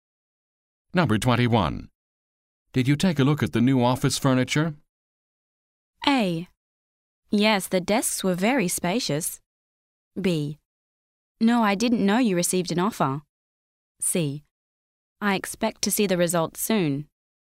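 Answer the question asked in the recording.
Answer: A: Yes, the desks were very spacious.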